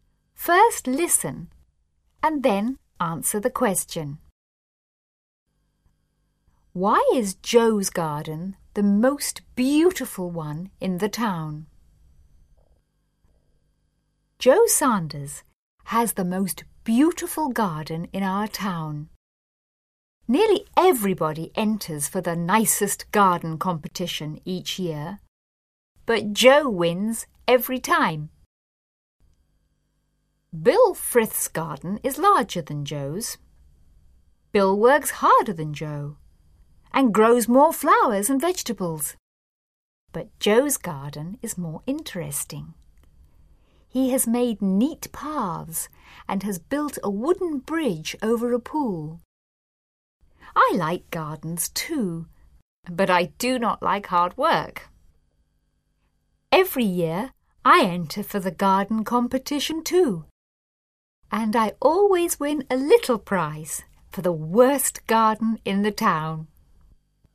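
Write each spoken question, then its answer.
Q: Why is Joe's garden the most beautiful one in the town?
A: Because it is more interesting: he has made neat paths and built a wooden bridge over a pool.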